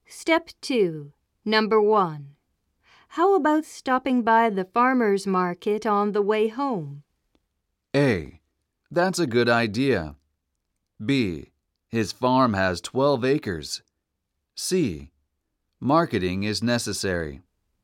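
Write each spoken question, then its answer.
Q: How about stopping by the farmer's market on the way home?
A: A: That's a good idea.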